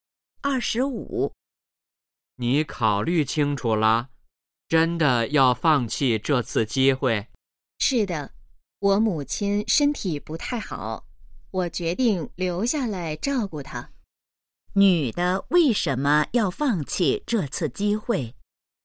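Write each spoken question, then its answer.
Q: 女的为什么要放弃这次机会?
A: 要照顾母亲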